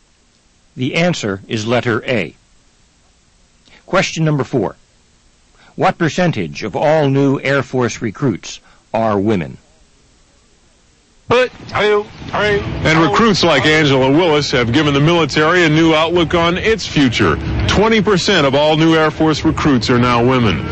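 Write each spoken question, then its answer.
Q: What percentage of all new Air Force recruits are women?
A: 20%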